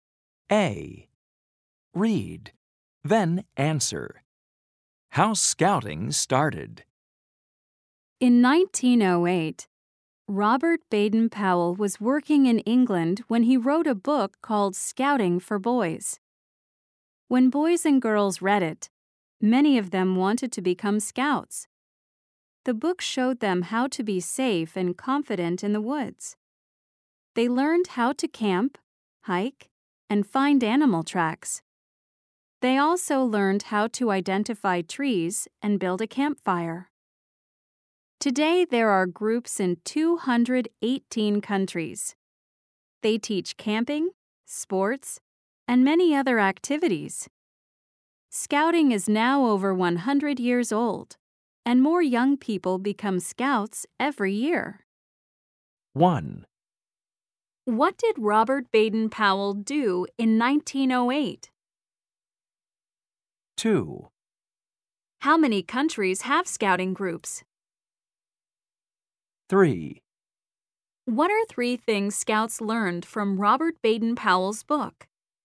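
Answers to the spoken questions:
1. He wrote a book called Scouting for Boys.
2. 218
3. How to camp, hike, and find animal tracks.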